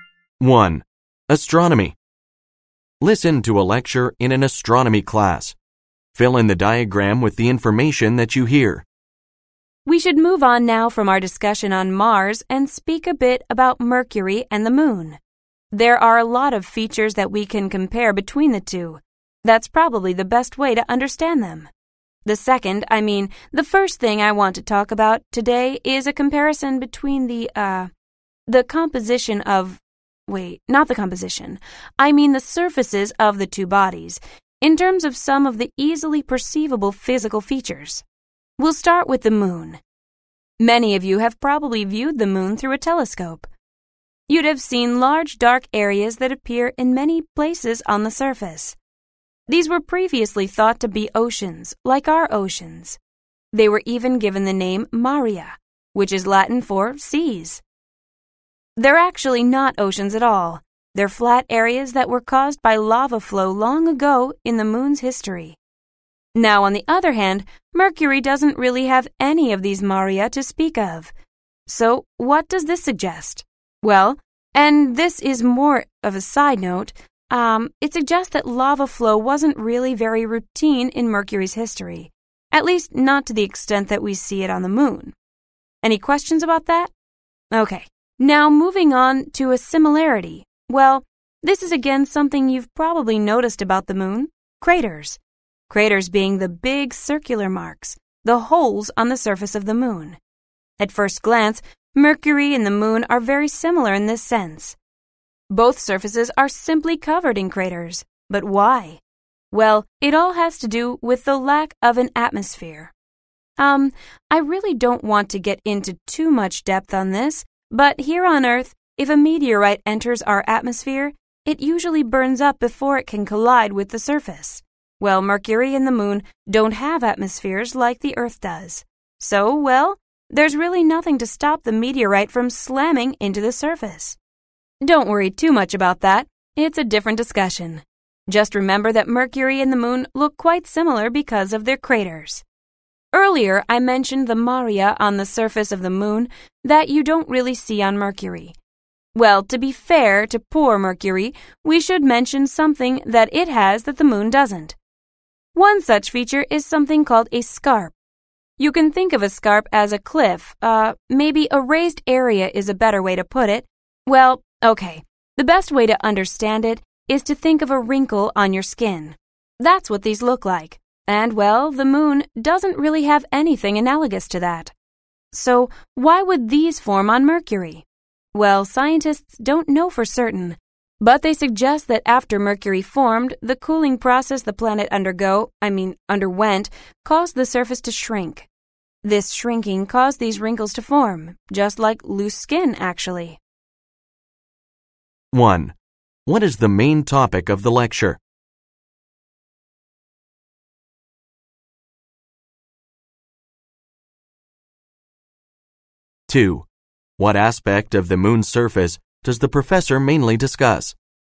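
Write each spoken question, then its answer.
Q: What is the main topic of the lecture?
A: A comparison of the surface features of Mercury and the Moon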